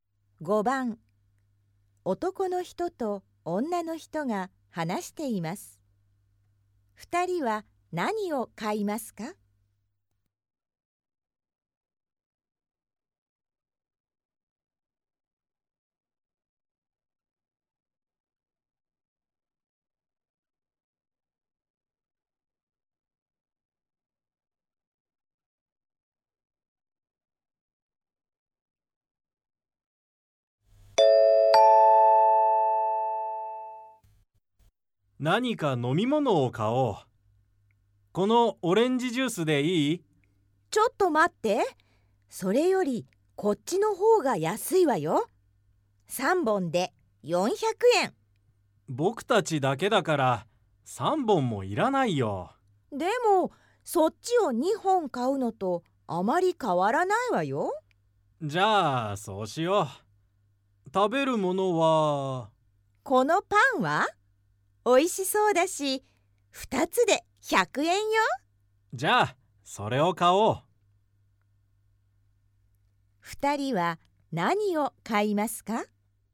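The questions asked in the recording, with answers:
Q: 2人は何を買いますか?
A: 安い方の飲み物3本(400円)とパン2つ(100円)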